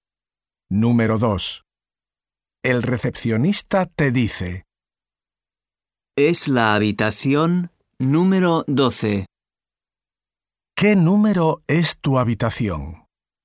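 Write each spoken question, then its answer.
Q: ¿Qué número es tu habitación?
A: 12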